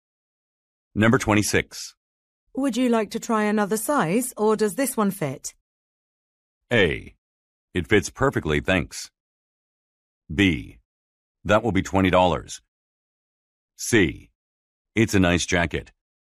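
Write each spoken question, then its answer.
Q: Would you like to try another size, or does this one fit?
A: A: It fits perfectly, thanks.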